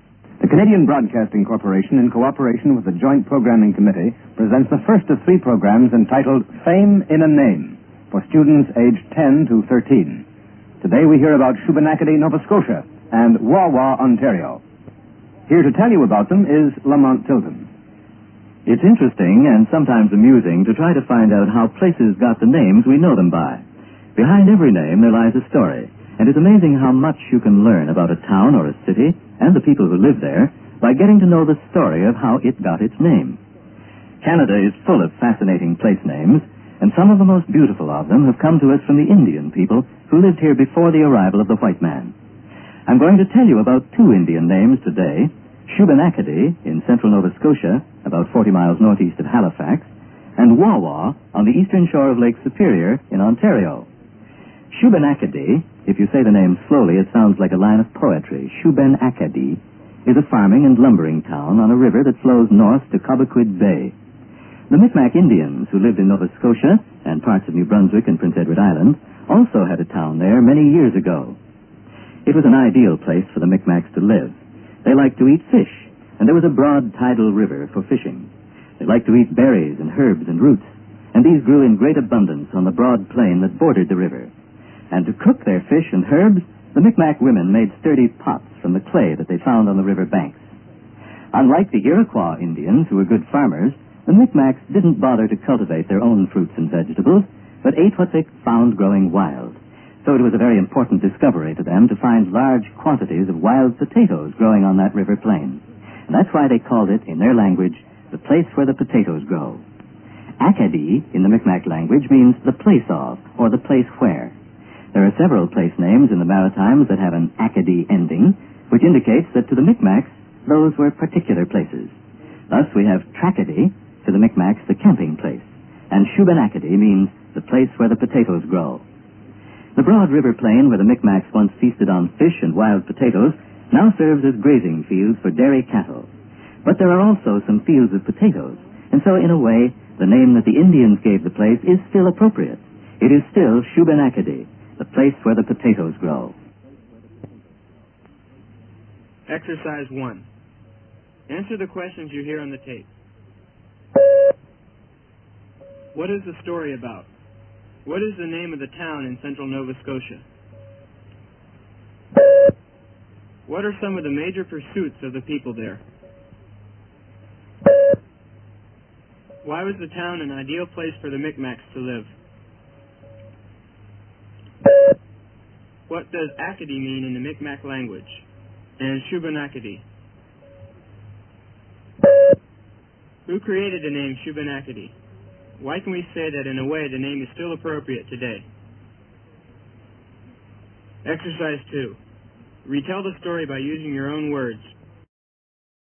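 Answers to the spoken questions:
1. How Canadian places got their names (Shubenacadie)
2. Shubenacadie
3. Farming and lumbering
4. A river for fishing, berries, herbs, roots and clay for pots
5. The place of, or the place where
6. The place where the potatoes grow
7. The Mi'kmaq Indians
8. There are still some potato fields there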